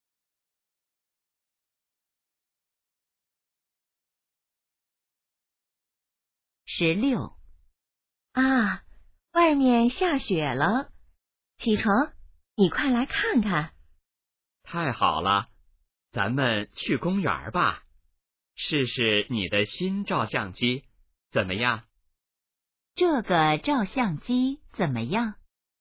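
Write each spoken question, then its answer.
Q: 这个照相机怎么样?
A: 是新的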